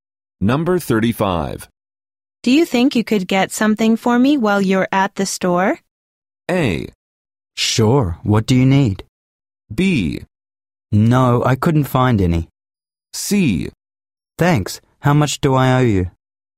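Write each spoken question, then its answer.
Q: Do you think you could get something for me while you're at the store?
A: A: Sure, what do you need?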